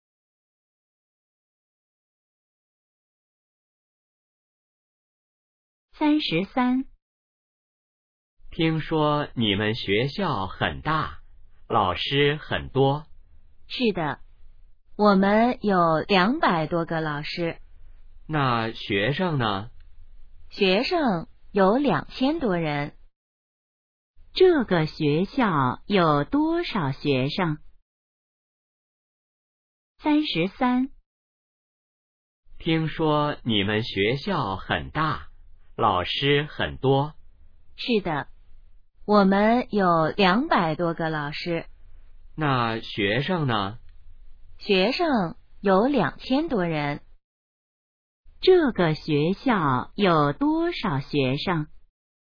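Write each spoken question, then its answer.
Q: 这个学校有多少学生?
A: 2000多人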